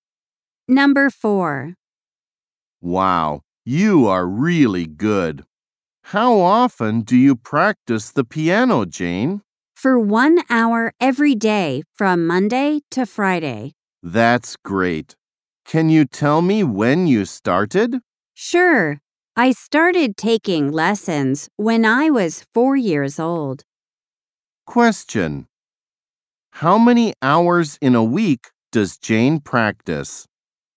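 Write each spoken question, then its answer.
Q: How many hours in a week does Jane practice?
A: 5 hours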